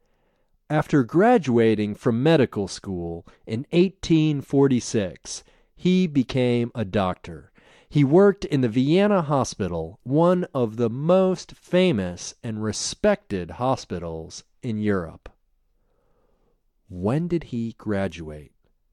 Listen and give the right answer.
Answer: He graduated in 1846.